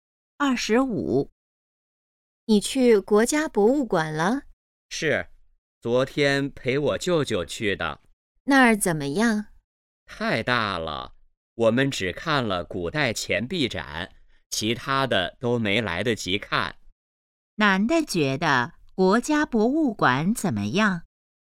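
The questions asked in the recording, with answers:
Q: 男的觉得国家博物馆怎么样?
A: 太大了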